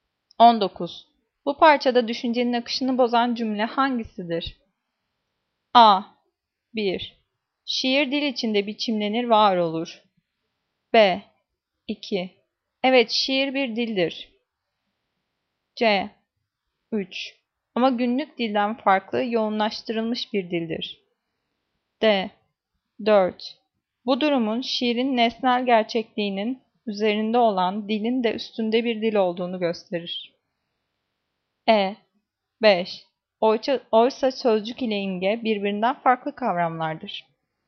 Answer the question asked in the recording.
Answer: Cevap E. Oysa sözcük ile imge birbirinden farklı kavramlardır.